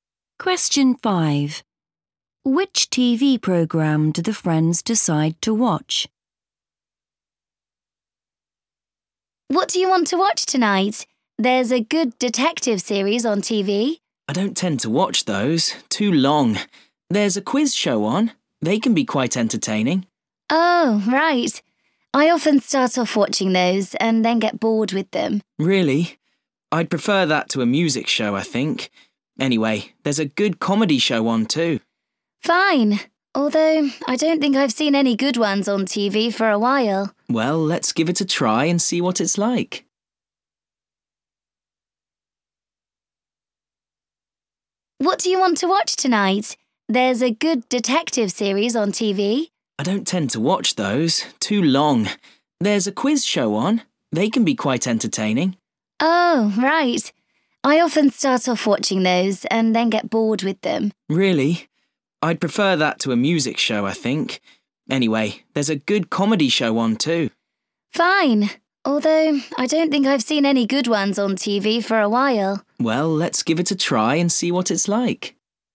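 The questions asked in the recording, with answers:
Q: Which TV program do the friends decide to watch?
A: a comedy show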